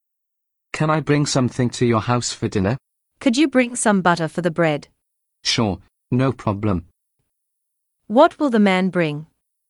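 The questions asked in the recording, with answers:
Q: What will the man bring?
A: Butter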